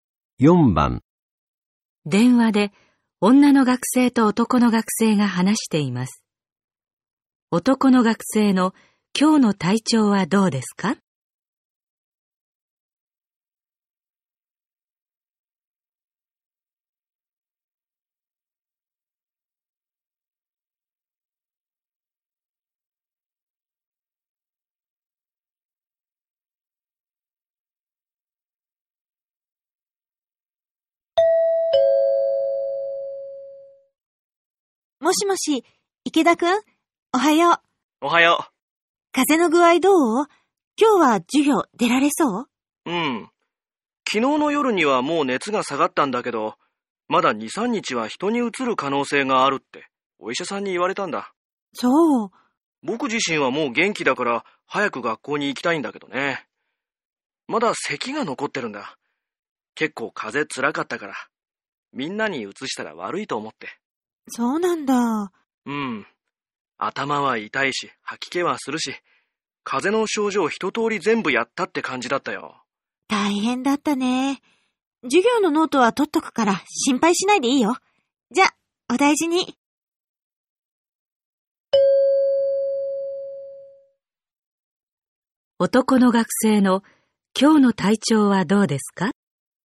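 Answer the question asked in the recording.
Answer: 熱は下がって元気だが、まだ咳が残っている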